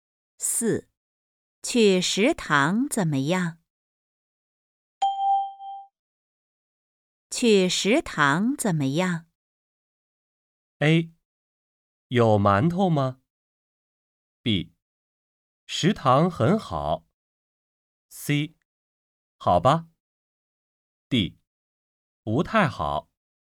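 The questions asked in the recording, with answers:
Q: 去食堂怎么样?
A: C: 好吧。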